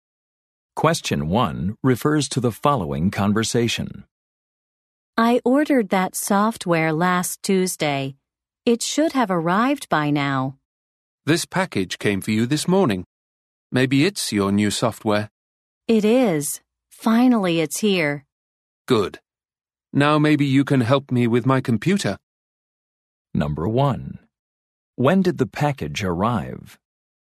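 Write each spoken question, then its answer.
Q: When did the package arrive?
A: This morning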